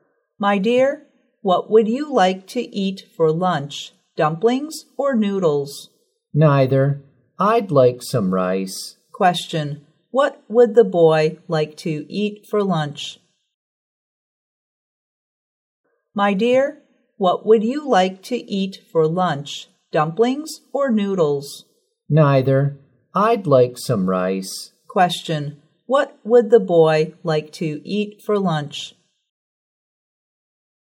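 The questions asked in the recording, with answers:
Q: What would the boy like to eat for lunch?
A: Rice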